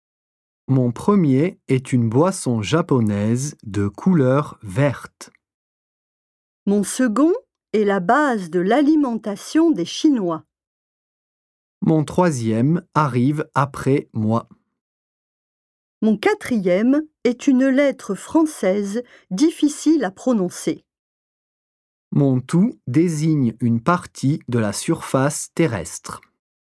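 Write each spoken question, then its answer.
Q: Mon tout désigne une partie de la surface terrestre.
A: territoire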